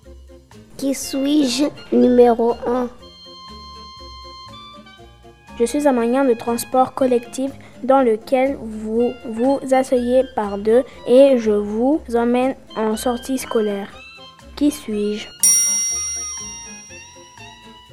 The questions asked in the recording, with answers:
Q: Qui suis-je?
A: Un bus.